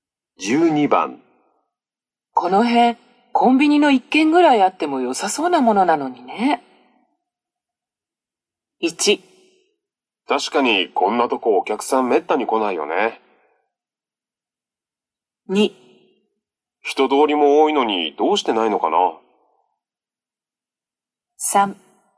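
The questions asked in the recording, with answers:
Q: この辺コンビニの1軒ぐらいあっても良さそうなものなのにね。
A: 2: 人通りも多いのにどうしてないのかな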